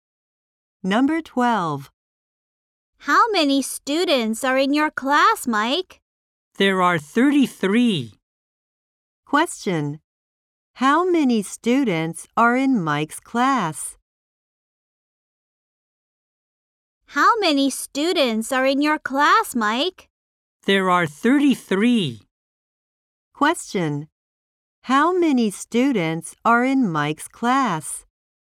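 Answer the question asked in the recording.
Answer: 33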